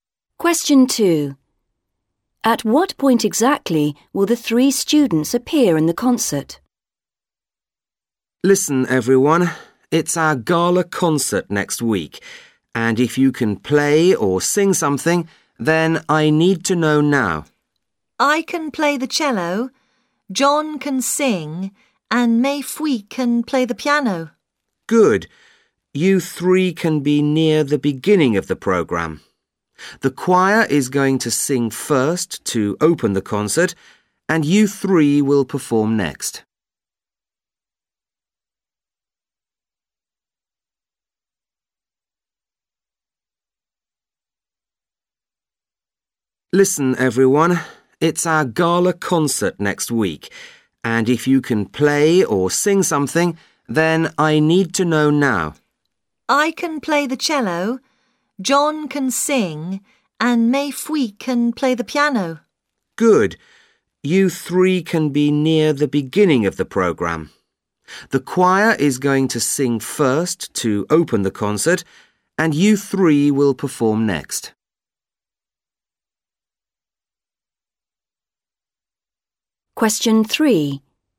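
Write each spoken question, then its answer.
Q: At what point exactly will the three students appear in the concert?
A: Second, straight after the choir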